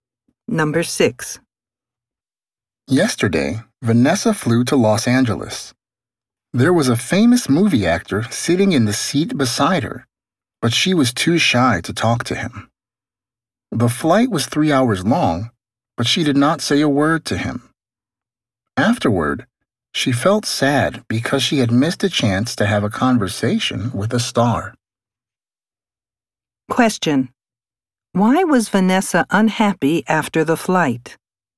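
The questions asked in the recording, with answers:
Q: Why was Vanessa unhappy after the flight?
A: She was too shy to talk to the famous actor beside her and missed her chance to talk with a star.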